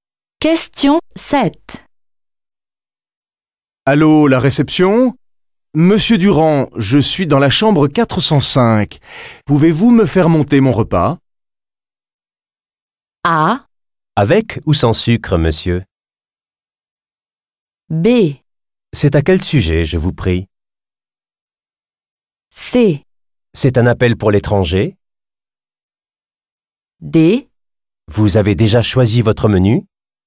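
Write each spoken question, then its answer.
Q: Allô, la réception ? Monsieur Durand, je suis dans la chambre 405. Pouvez-vous me faire monter mon repas ?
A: D: Vous avez déjà choisi votre menu ?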